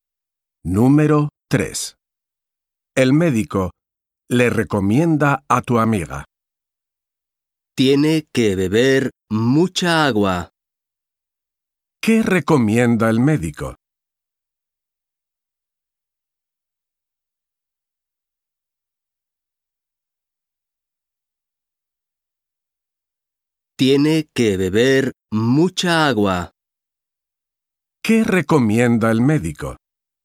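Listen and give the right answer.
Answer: beber mucha agua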